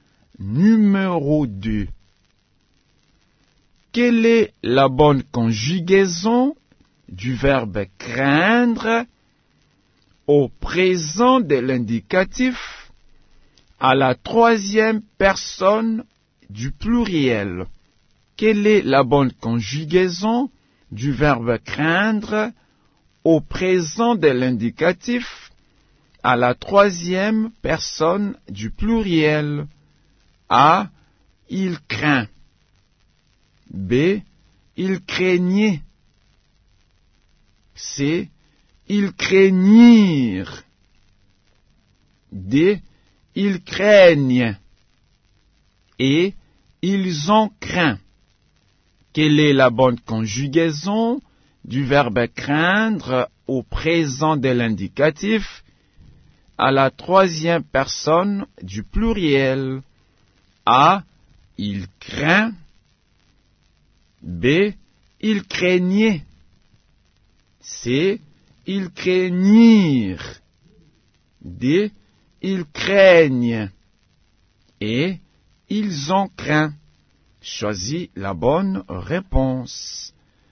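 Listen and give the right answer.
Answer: D: Ils craignent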